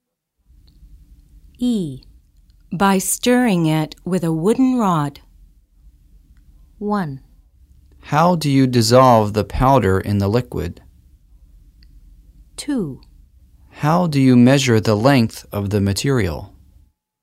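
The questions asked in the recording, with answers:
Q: By stirring it with a wooden rod.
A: 1: How do you dissolve the powder in the liquid?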